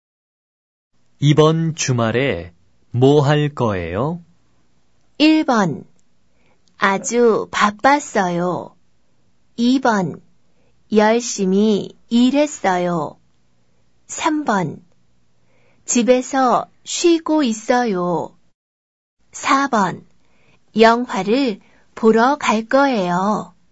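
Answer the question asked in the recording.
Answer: 4: 영화를 보러 갈 거예요.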